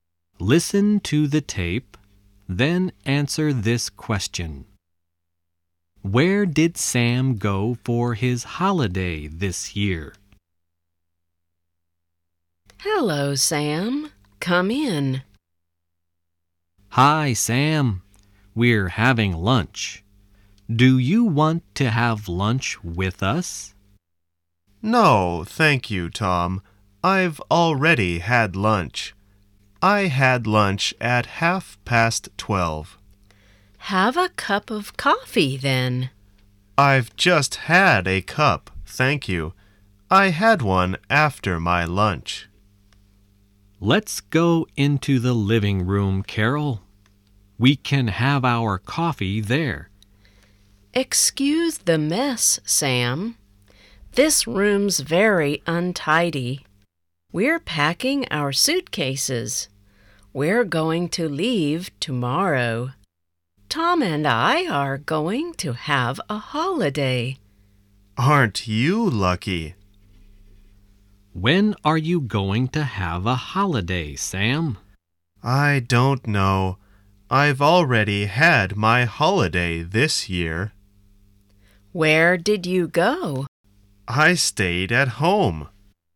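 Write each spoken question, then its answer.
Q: Where did Sam go for his holiday this year?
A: He stayed at home.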